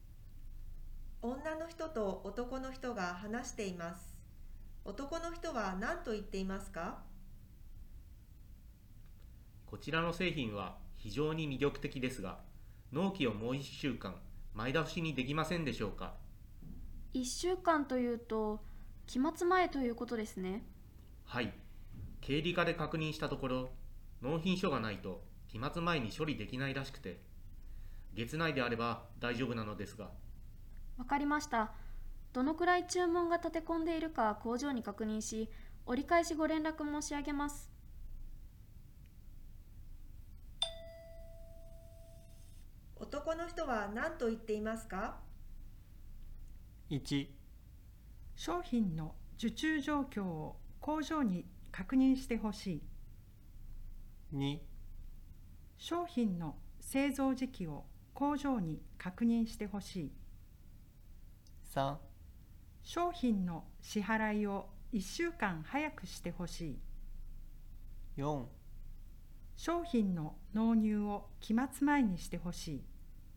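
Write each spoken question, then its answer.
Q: 男の人は何と言っていますか?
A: 4: 商品の納入を期末前にしてほしい。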